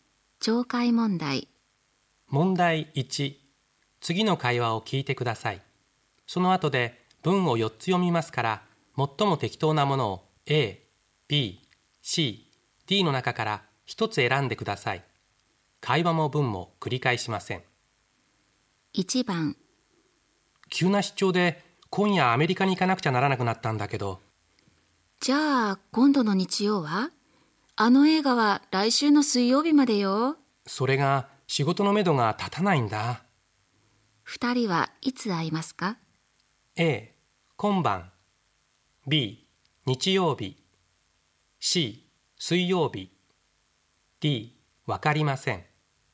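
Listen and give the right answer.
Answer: D: わかりません。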